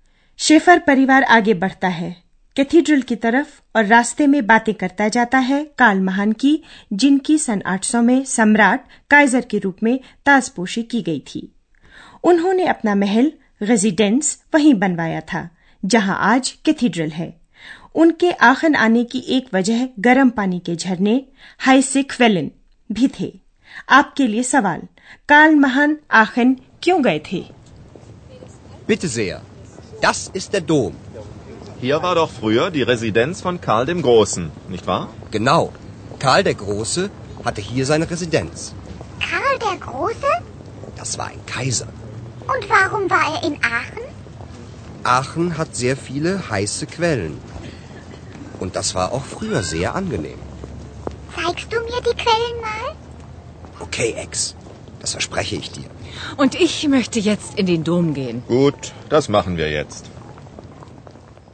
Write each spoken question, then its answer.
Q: काल महान आखन क्यों गए थे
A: काल महान आखन इसलिए गए थे कि उन्हें गर्म पानी के झरने मनोहर लगते थे